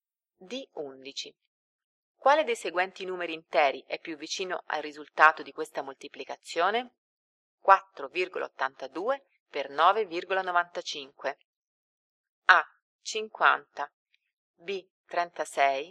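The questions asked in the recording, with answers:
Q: Quale dei seguenti numeri interi è più vicino al risultato di questa moltiplicazione?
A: D: 48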